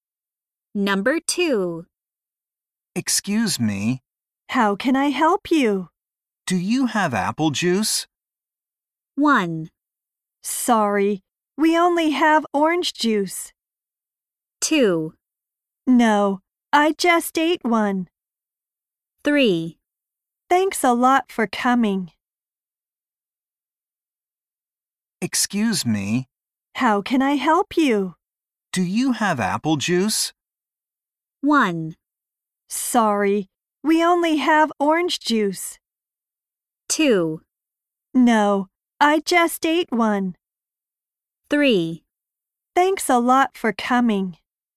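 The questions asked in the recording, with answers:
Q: Do you have apple juice?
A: 1: Sorry, we only have orange juice.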